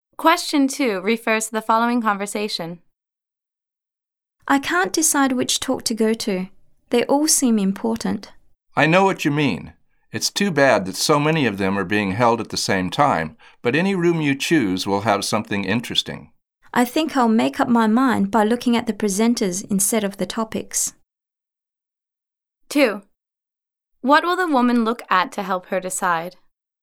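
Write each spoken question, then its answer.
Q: What will the woman look at to help her decide?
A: The presenters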